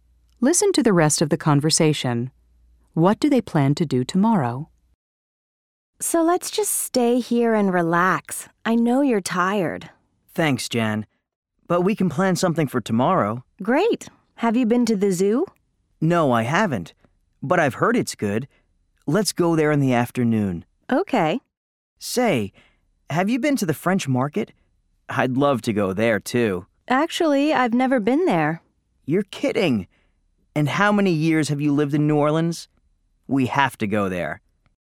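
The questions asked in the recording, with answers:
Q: What do they plan to do tomorrow?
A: Go to the zoo in the afternoon and go to the French market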